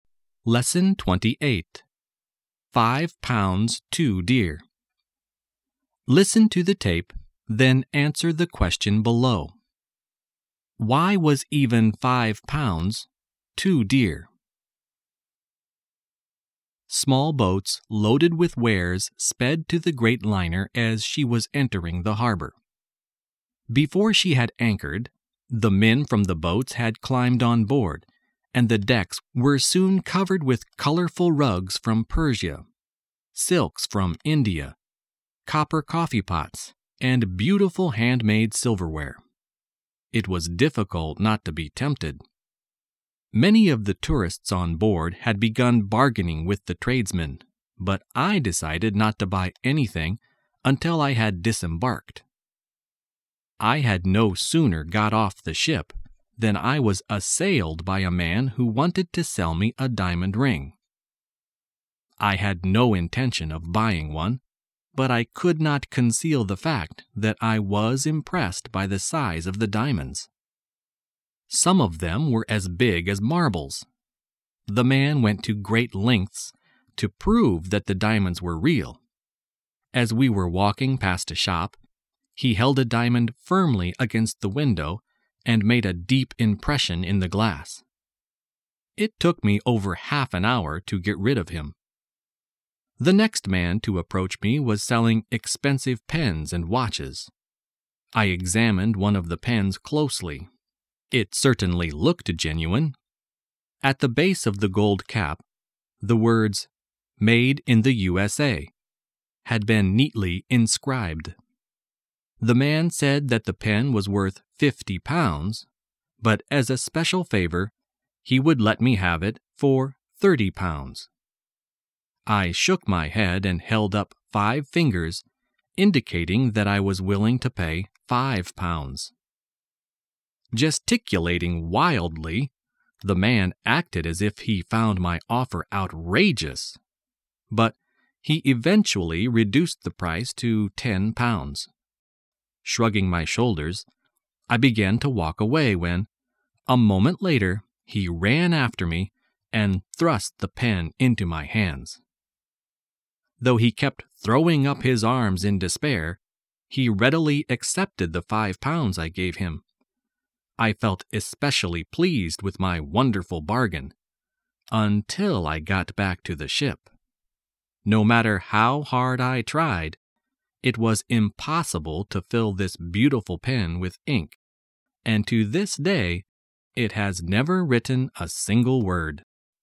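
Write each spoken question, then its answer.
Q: Why was even 5 pounds, 2 deer?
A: Because the pen was useless: it could never be filled with ink and never wrote a word.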